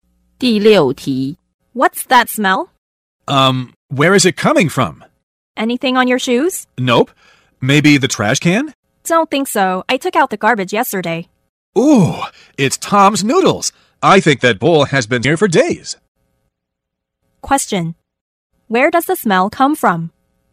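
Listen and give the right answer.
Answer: Tom's old bowl of noodles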